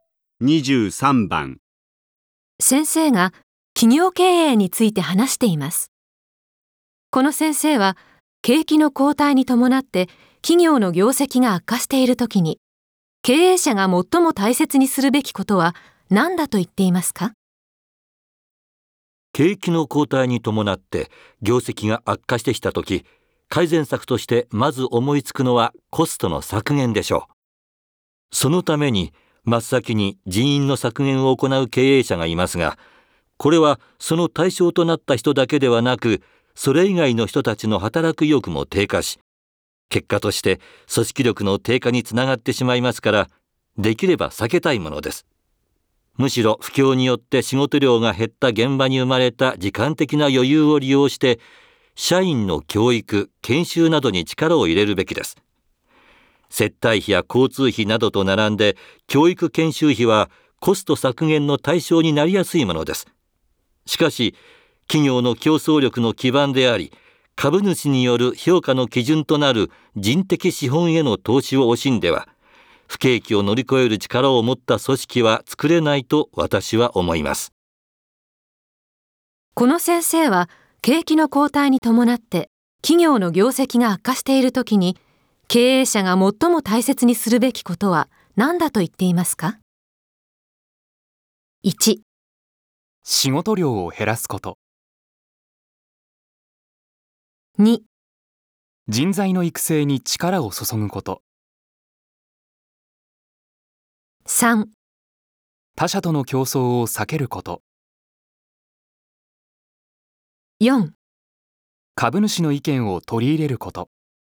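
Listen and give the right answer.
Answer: 2: 人材の育成に力を注ぐこと。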